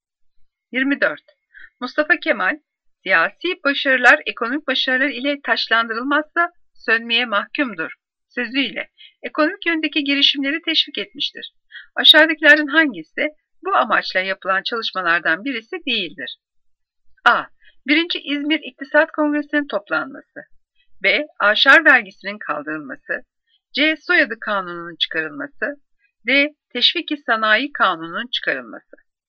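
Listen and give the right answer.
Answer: C: Soyadı Kanunu'nun çıkarılması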